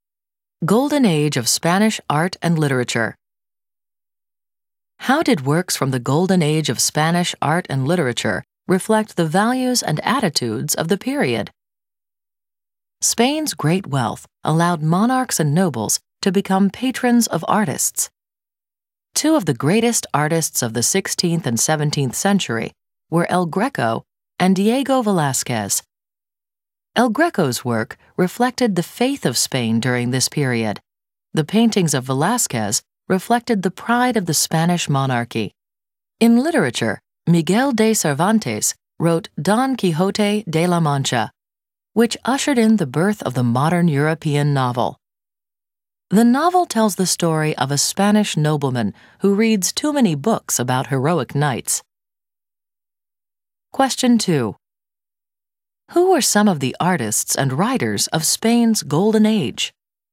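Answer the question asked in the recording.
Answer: El Greco, Diego Velázquez and Miguel de Cervantes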